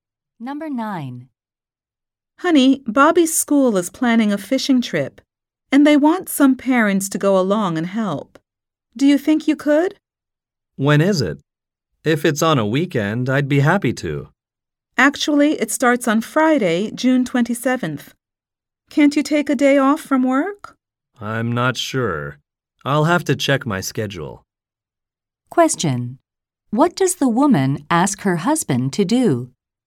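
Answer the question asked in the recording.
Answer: Help on Bobby's school fishing trip.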